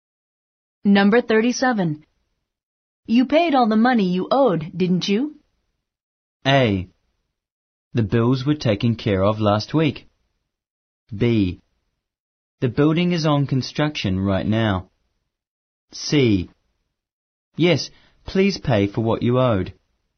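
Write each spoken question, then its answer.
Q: You paid all the money you owed, didn't you?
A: A: The bills were taken care of last week.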